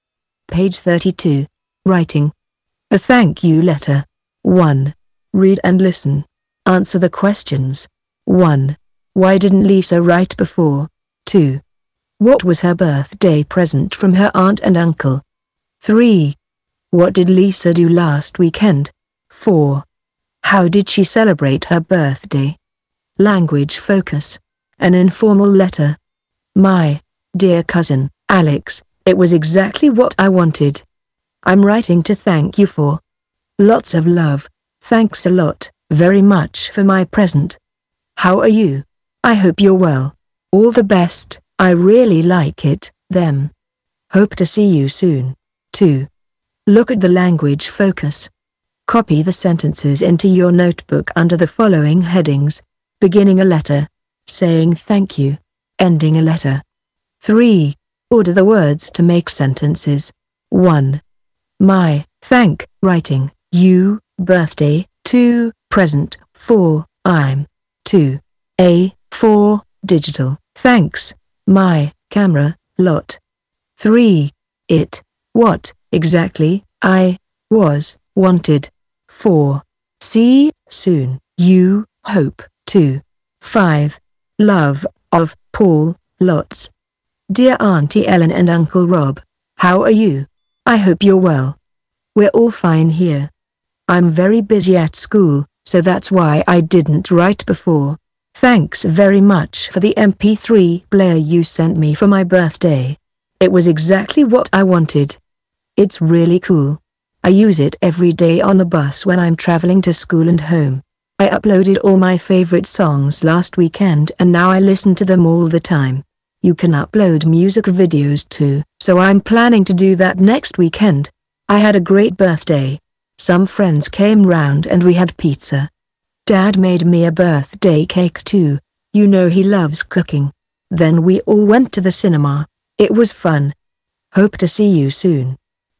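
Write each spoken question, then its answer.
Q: Why didn't Lisa write before?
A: She was very busy at school.

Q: What was her birthday present from her aunt and uncle?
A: An MP3 player.

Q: What did Lisa do last weekend?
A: She uploaded all her favourite songs to the MP3 player.

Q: How did she celebrate her birthday?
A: Friends came round, they had pizza and a cake her dad made, then went to the cinema.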